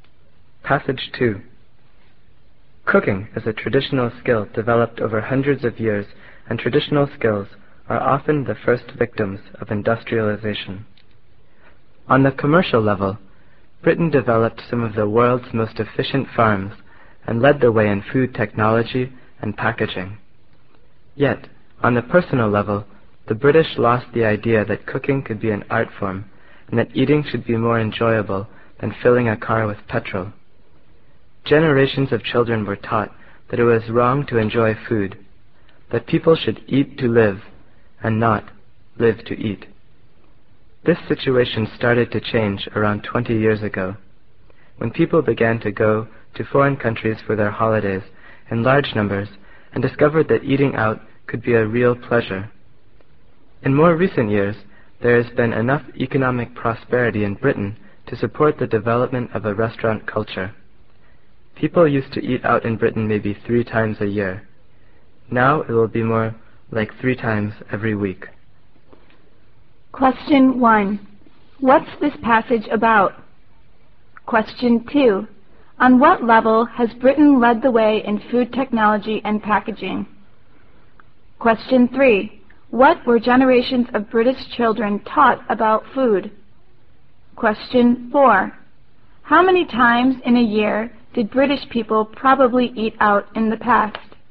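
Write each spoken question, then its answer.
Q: On what level has Britain led the way in food technology and packaging?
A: On the commercial level

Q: What were generations of British children taught about food?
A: That it was wrong to enjoy food; eat to live, not live to eat

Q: How many times in a year did British people probably eat out in the past?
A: About 3 times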